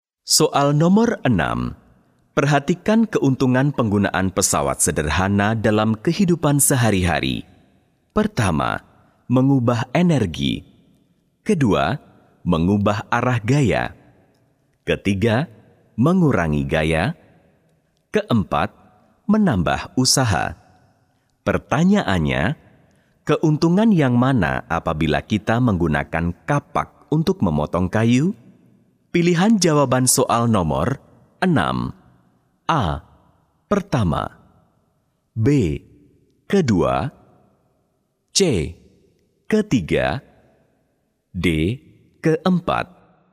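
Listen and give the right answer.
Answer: C: Ketiga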